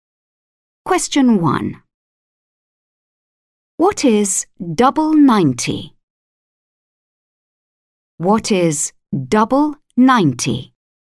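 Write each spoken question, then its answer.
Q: What is double 90?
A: 180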